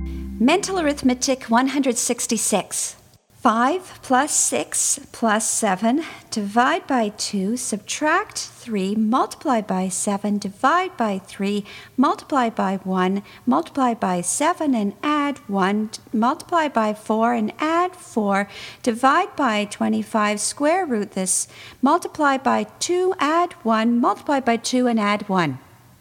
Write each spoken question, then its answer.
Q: 5 plus 6 plus 7, divide by 2, subtract 3, multiply by 7, divide by 3, multiply by 1, multiply by 7 and add 1, multiply by 4 and add 4, divide by 25, square root this, multiply by 2, add 1, multiply by 2 and add 1.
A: And the answer is 19.